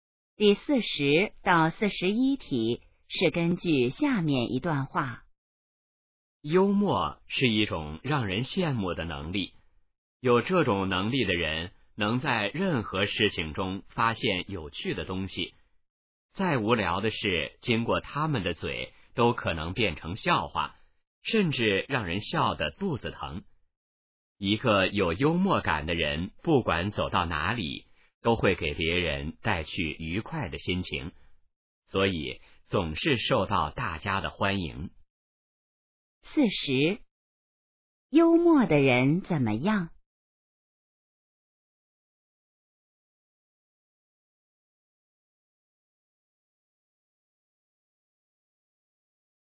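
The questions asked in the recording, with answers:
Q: 幽默的人怎么样?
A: 能在任何事情中发现有趣的东西

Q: 幽默的人为什么受欢迎?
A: 给别人带去愉快的心情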